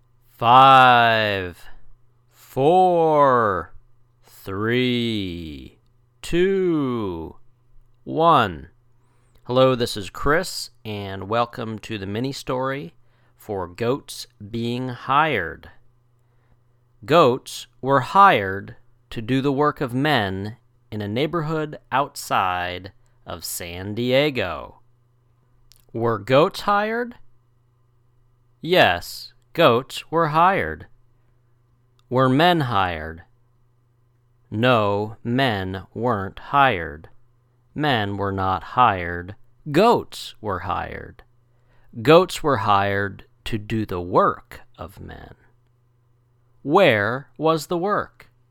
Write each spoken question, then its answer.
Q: Where was the work?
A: The work was in a neighborhood outside of San Diego.